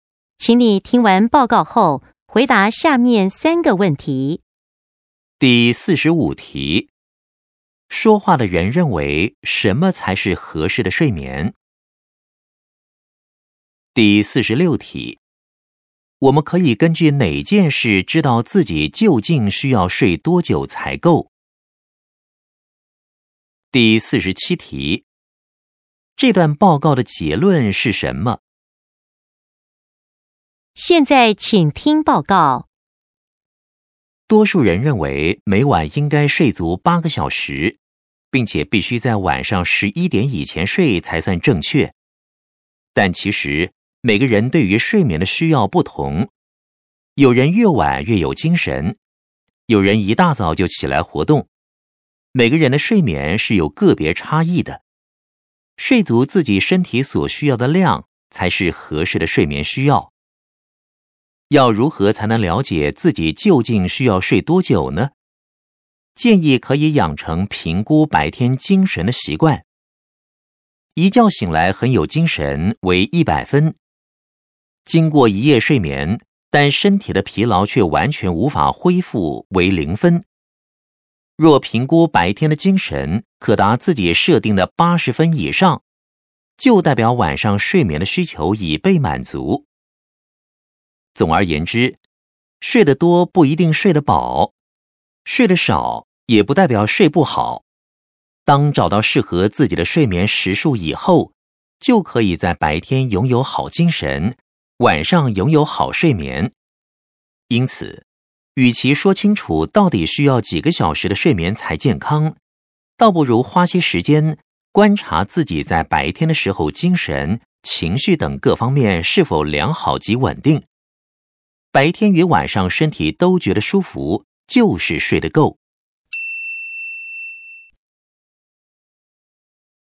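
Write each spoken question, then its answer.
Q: 说话的人认为什么才是合适的睡眠?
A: 睡足自己身体所需要的量

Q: 我们可以根据哪件事知道自己究竟需要睡多久才够?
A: 评估白天的精神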